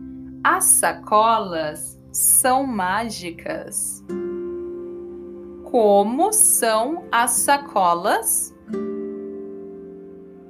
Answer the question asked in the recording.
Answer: Mágicas. As sacolas são mágicas.